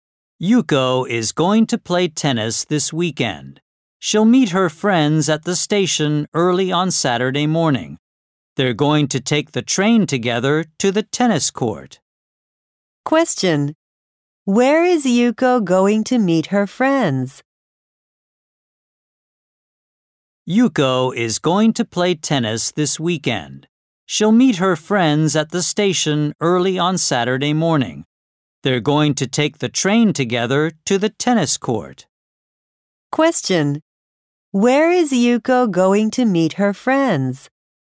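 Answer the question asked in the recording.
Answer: At the station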